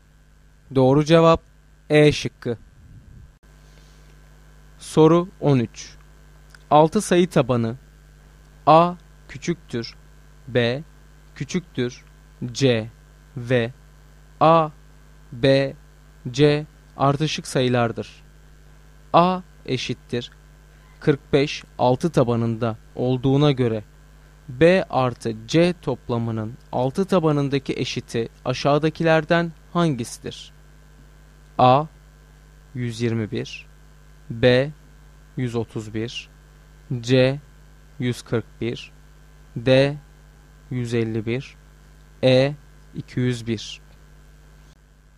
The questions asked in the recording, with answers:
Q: A eşittir 45 6 tabanında olduğuna göre B artı C toplamının 6 tabanındaki eşiti aşağıdakilerden hangisidir?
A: Doğru cevap C şıkkı.